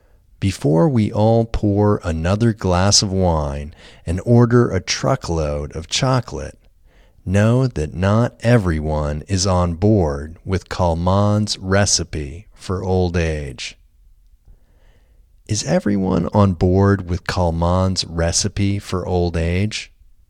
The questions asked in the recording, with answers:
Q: Is everyone on board with Kalman's recipe for old age?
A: No, not everyone is on board with Kalman's recipe for old age.